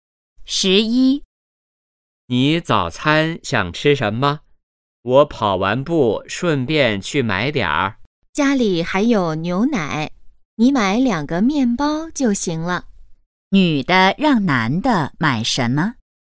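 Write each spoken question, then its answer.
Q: 女的让男的买什么?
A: 面包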